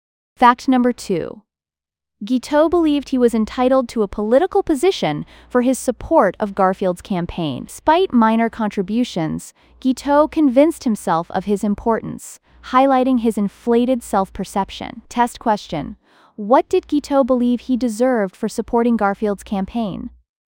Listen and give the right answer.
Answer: Correct answer. A political position.